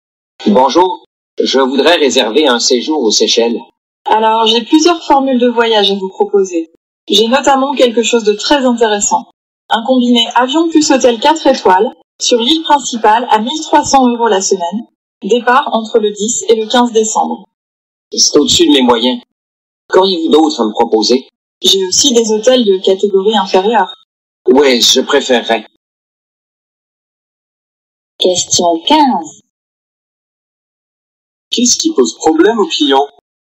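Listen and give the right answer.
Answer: Le prix : c'est trop cher (au-dessus de ses moyens).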